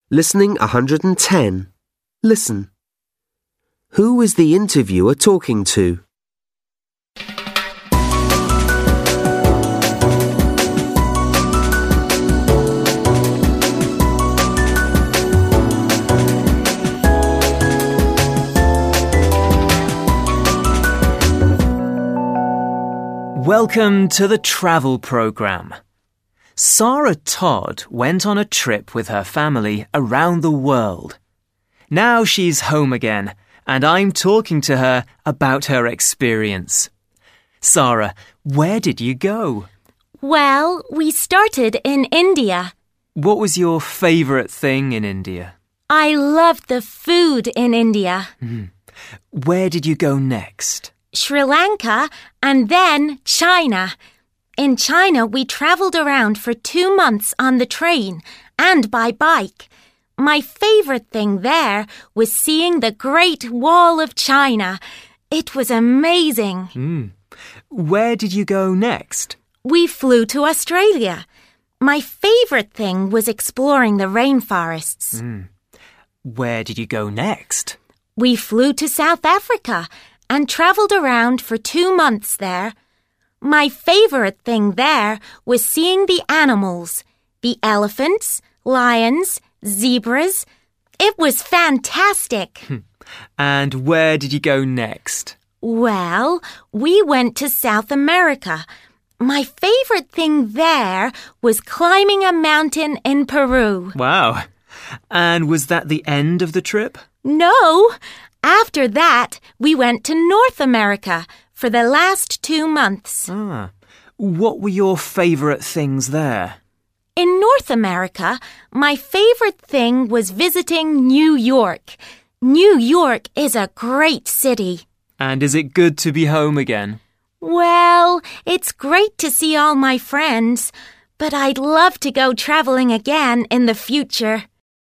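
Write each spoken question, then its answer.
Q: Who is the interviewer talking to?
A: Sarah Todd, who went on a trip around the world with her family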